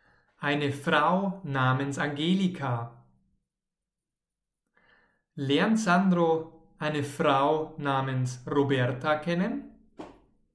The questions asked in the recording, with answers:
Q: Lernt Sandro eine Frau namens Roberta kennen?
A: Nein, er lernt natürlich keine Frau namens Roberta kennen.